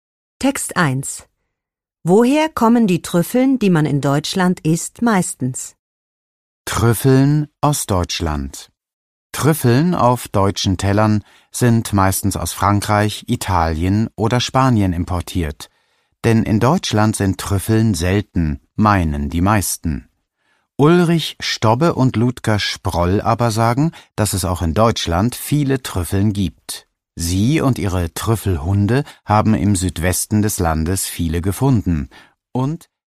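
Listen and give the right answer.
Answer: Aus Frankreich, Italien oder Spanien (importiert)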